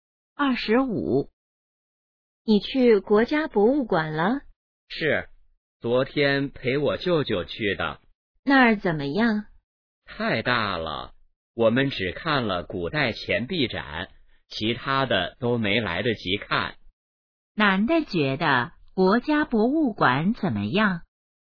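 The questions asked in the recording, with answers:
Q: 男的觉得国家博物馆怎么样?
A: 太大了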